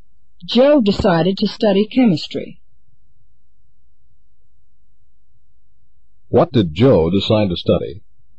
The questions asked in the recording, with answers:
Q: What did Joe decide to study?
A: He decided to study chemistry.